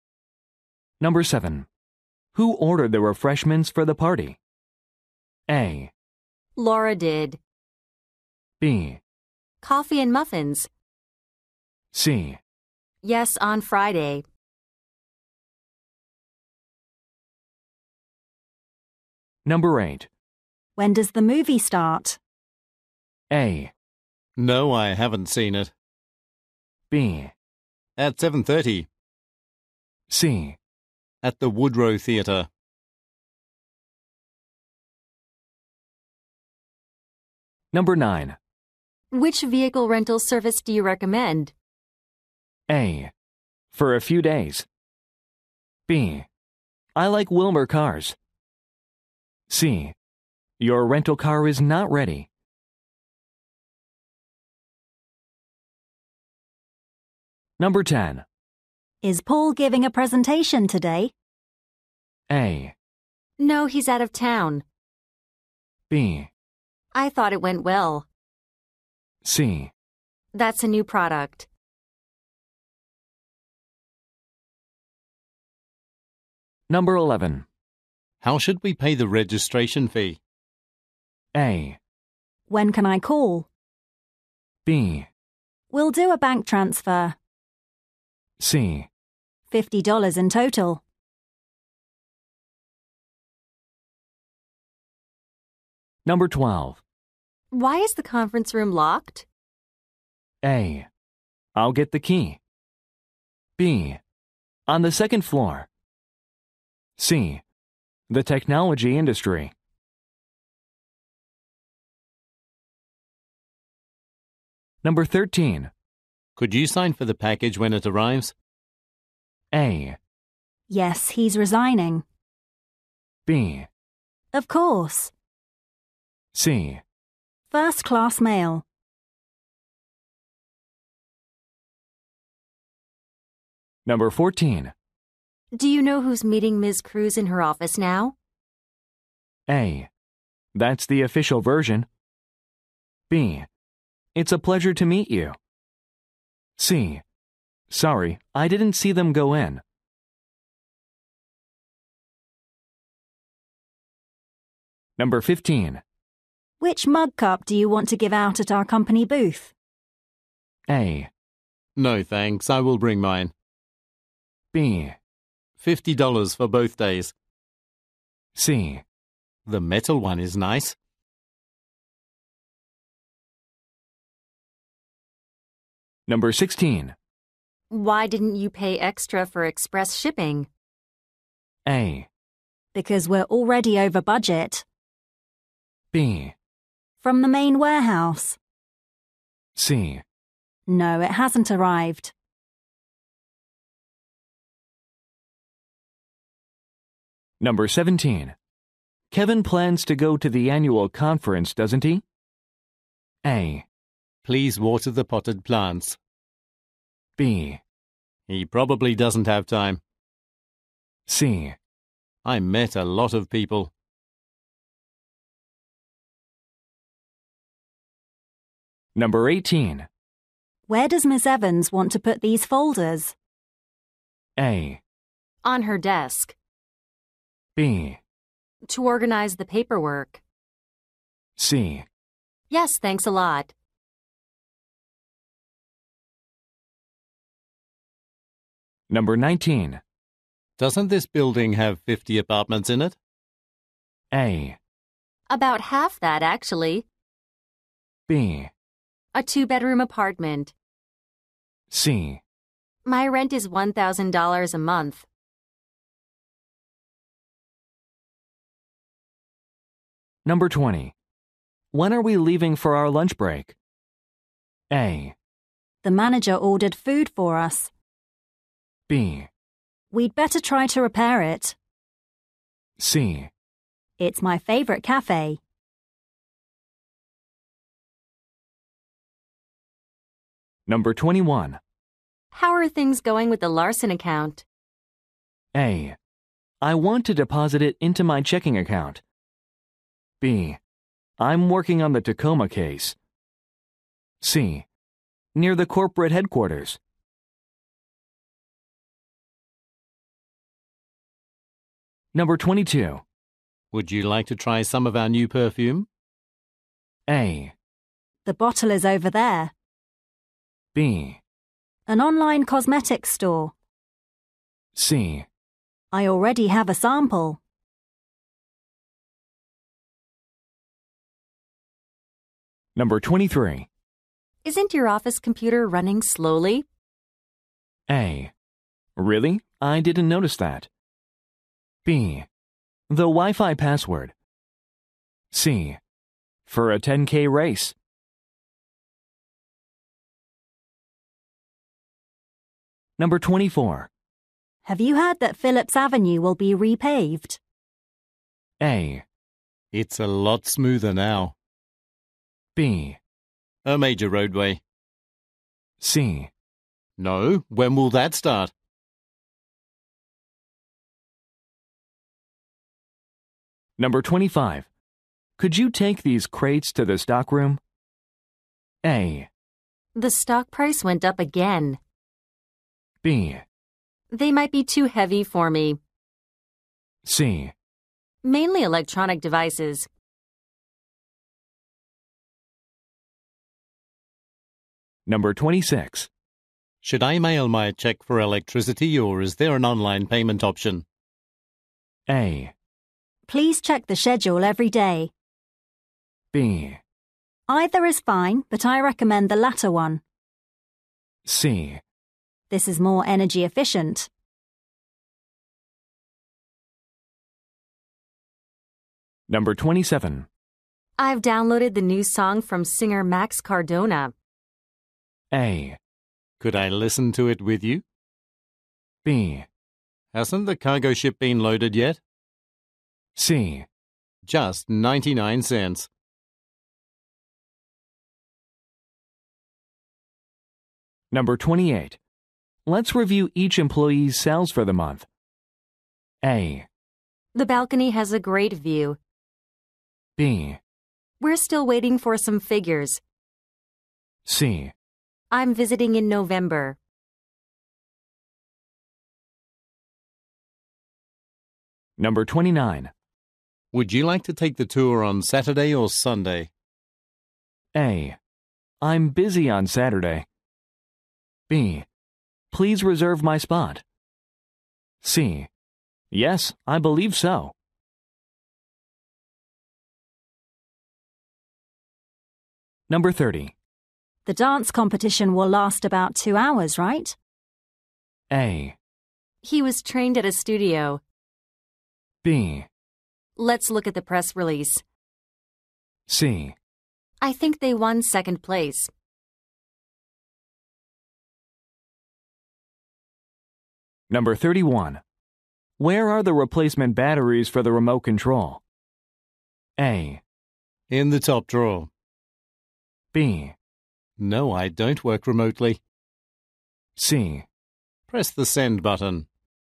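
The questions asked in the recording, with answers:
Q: Who ordered the refreshments for the party?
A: A: Laura did.

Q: When does the movie start?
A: B: At 7:30.

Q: Which vehicle rental service do you recommend?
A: B: I like Wilmer Cars.

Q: Is Paul giving a presentation today?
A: A: No, he's out of town.

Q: How should we pay the registration fee?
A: B: We'll do a bank transfer.

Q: Could you sign for the package when it arrives?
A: B: Of course.

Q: Do you know who's meeting Ms. Cruz in her office now?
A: C: Sorry, I didn't see them go in.

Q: Which mug cup do you want to give out at our company booth?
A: C: The metal one is nice.

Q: Why didn't you pay extra for express shipping?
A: A: Because we're already over budget.

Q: Kevin plans to go to the annual conference, doesn't he?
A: B: He probably doesn't have time.

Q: Where does Miss Evans want to put these folders?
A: A: On her desk.

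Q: Doesn't this building have 50 apartments in it?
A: A: About half that, actually.

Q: When are we leaving for our lunch break?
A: A: The manager ordered food for us.

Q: Would you like to try some of our new perfume?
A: C: I already have a sample.

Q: Isn't your office computer running slowly?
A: A: Really? I didn't notice that.

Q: Have you heard that Phillips Avenue will be repaved?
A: C: No, when will that start?

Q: Could you take these crates to the stockroom?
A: B: They might be too heavy for me.

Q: Should I mail my check for electricity or is there an online payment option?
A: B: Either is fine, but I recommend the latter one.

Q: I've downloaded the new song from singer Max Cardona.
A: A: Could I listen to it with you?

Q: Let's review each employee's sales for the month.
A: B: We're still waiting for some figures.

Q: Would you like to take the tour on Saturday or Sunday?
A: A: I'm busy on Saturday.

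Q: The dance competition will last about 2 hours, right?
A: B: Let's look at the press release.

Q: Where are the replacement batteries for the remote control?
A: A: In the top drawer.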